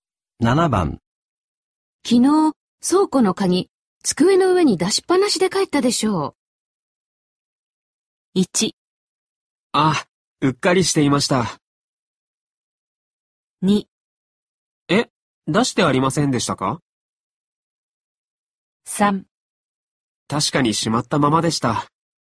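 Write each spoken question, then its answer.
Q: 昨日、倉庫の鍵、机の上に出しっぱなしで帰ったでしょう。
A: 1: あ、うっかりしていました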